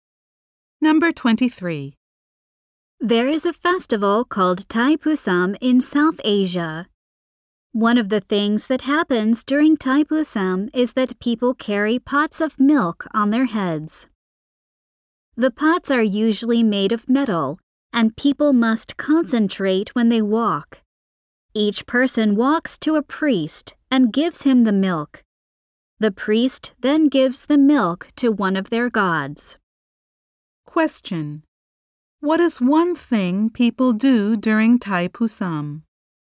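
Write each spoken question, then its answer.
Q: What is one thing people do during Thai Pusam?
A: They carry pots of milk on their heads.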